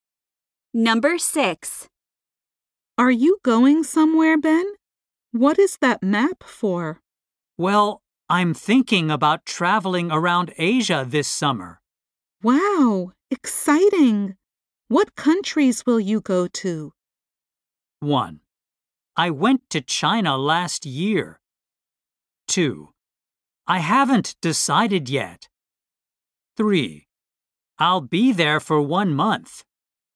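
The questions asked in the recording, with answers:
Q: Wow, exciting! What countries will you go to?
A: 2: I haven't decided yet.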